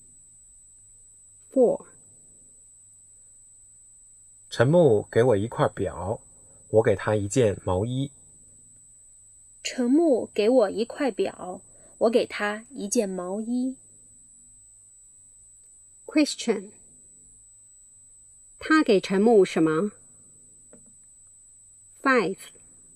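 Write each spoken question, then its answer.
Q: 他给陈木什么?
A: 一件毛衣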